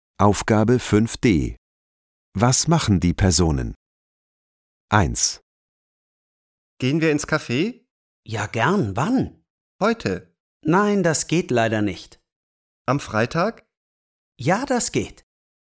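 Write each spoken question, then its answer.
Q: Was machen die Personen?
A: Sie gehen am Freitag ins Café.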